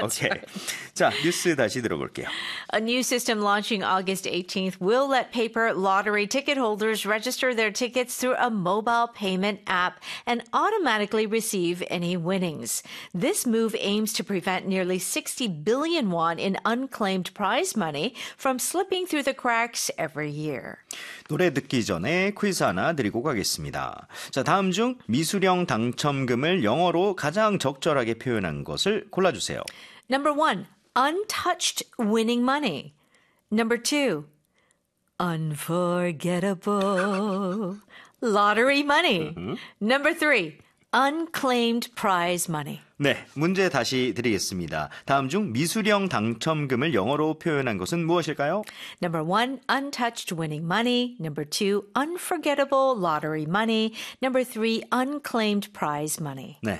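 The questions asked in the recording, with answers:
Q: 다음 중 미수령 당첨금을 영어로 가장 적절하게 표현한 것을 골라주세요.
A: 3: unclaimed prize money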